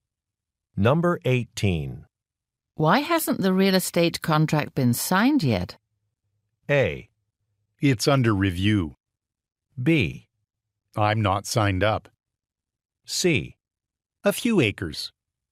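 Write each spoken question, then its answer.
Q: Why hasn't the real estate contract been signed yet?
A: A: It's under review.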